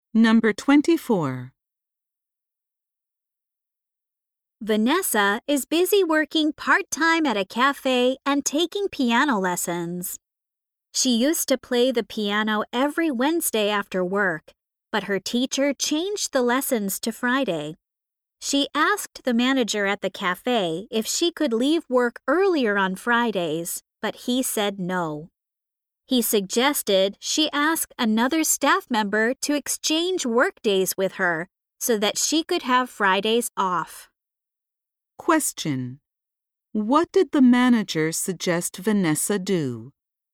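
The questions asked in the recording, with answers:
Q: What did the manager suggest Vanessa do?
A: Ask another staff member to exchange work days with her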